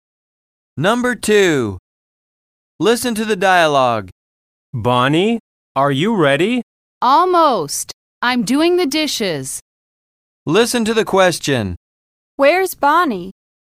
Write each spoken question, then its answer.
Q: Where's Bonnie?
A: She's in the kitchen.